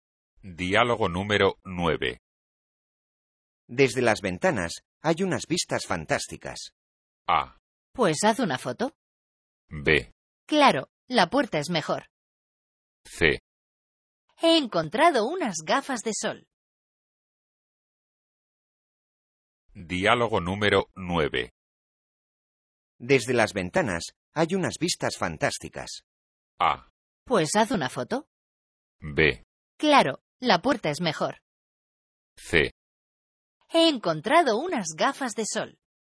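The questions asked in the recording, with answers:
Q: Desde las ventanas hay unas vistas fantásticas.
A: A: Pues haz una foto.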